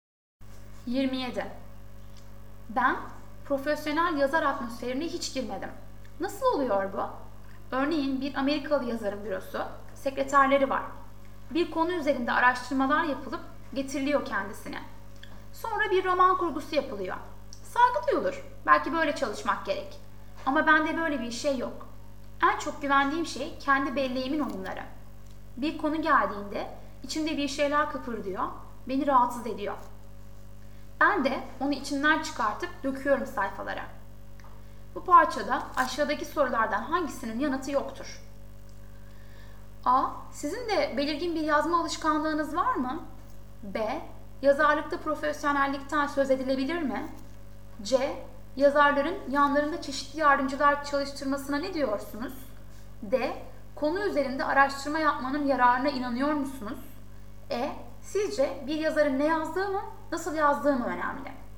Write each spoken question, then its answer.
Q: Bu parçada aşağıdaki sorulardan hangisinin yanıtı yoktur?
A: Doğru yanıt E.